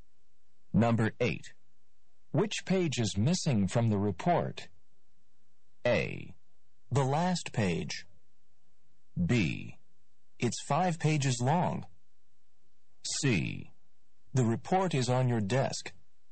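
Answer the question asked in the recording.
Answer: A: The last page.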